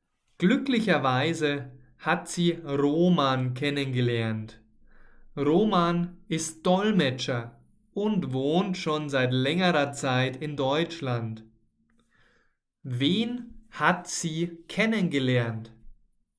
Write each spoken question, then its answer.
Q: hat sie kennengelernt?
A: Roman. Sie hat